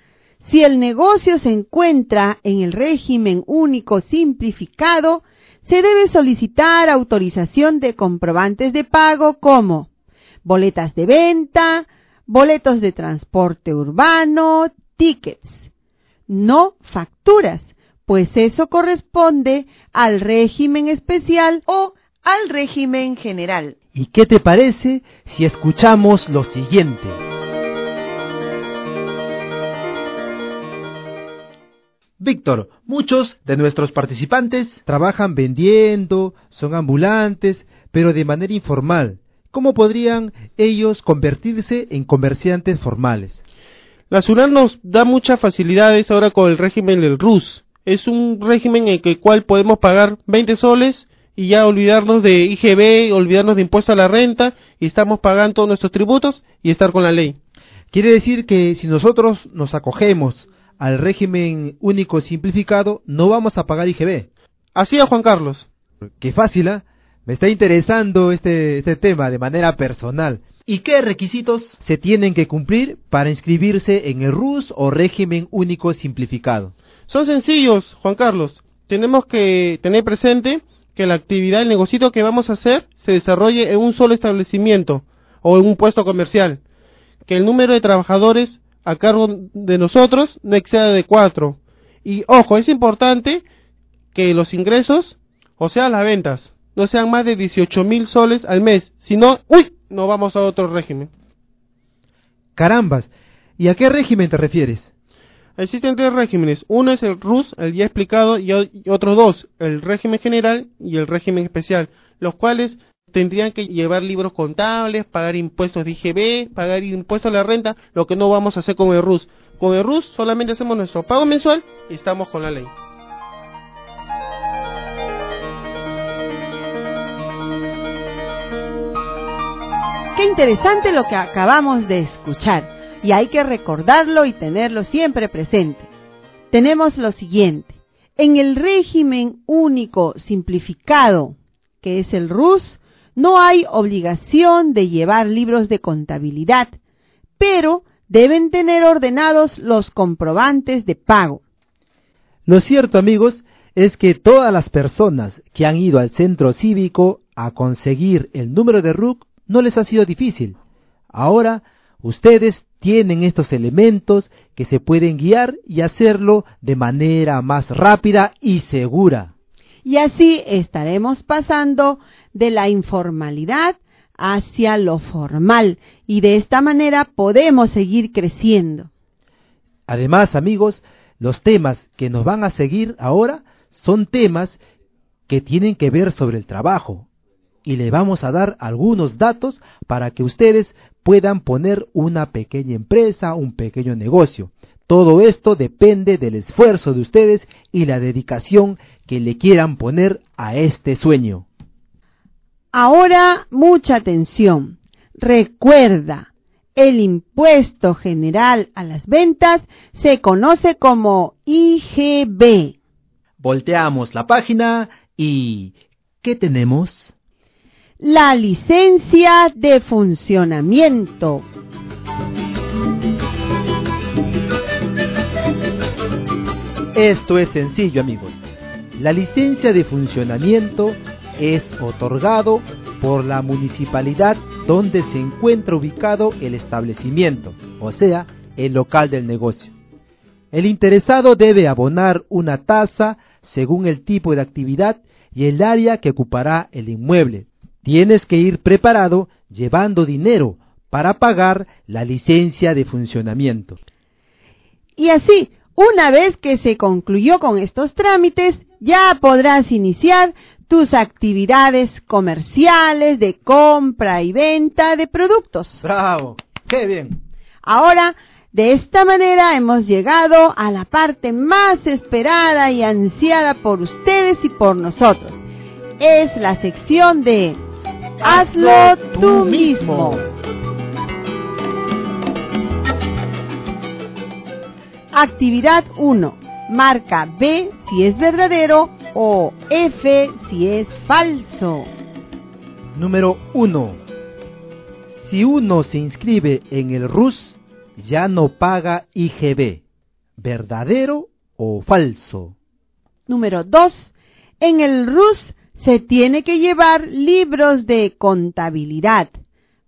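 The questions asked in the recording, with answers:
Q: Si uno se inscribe en el RUS, ya no paga IGB.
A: Verdadero

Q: En el RUS se tiene que llevar libros de contabilidad.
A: Falso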